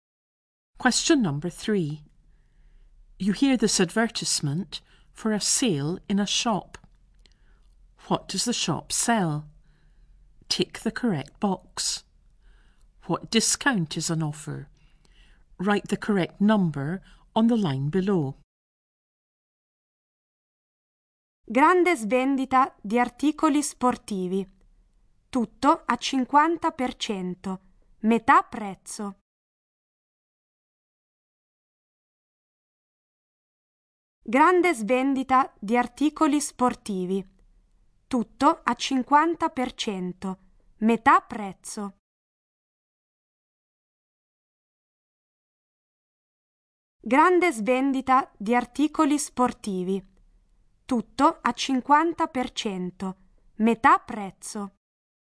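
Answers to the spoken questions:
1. Sports goods
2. 50%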